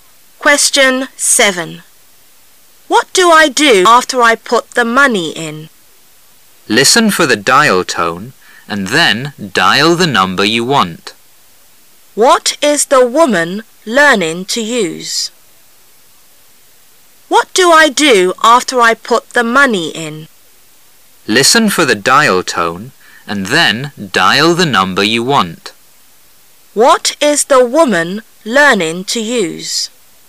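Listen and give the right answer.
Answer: A pay phone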